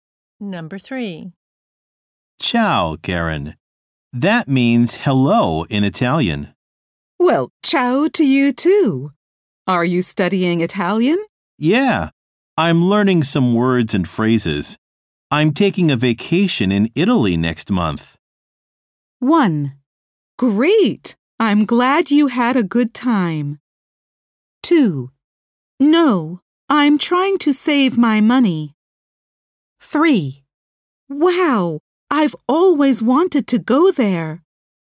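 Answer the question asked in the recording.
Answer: 3: Wow, I've always wanted to go there.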